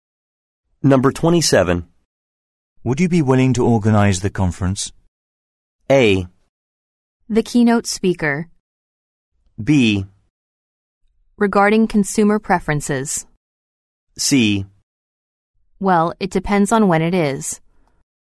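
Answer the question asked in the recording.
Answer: C: Well, it depends on when it is.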